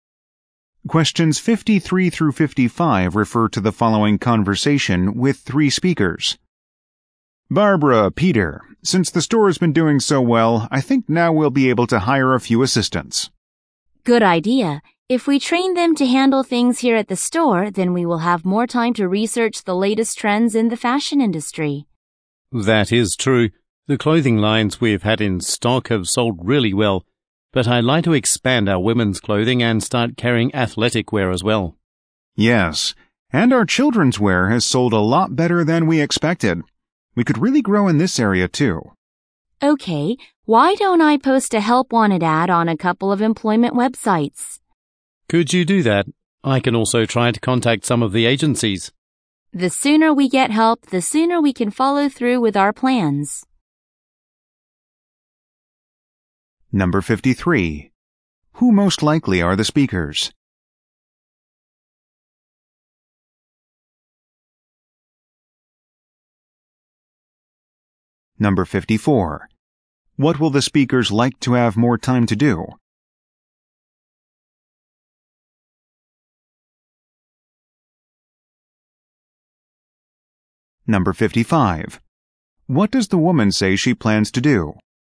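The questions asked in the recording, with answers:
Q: Who most likely are the speakers?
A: Clothing store owners

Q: What will the speakers like to have more time to do?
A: Research the latest fashion trends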